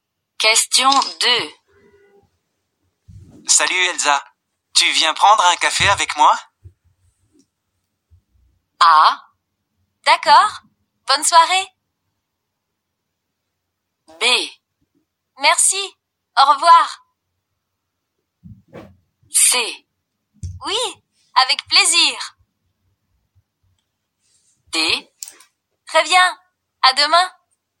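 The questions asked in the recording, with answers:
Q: Salut Elsa, tu viens prendre un café avec moi?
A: C: Oui, avec plaisir.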